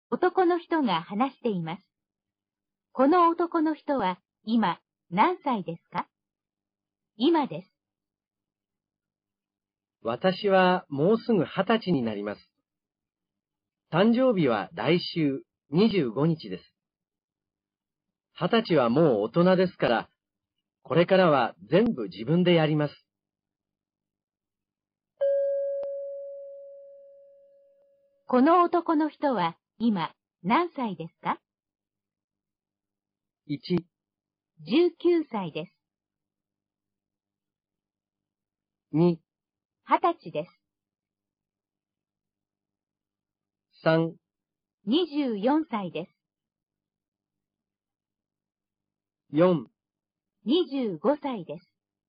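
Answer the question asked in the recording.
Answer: 1: 19歳です。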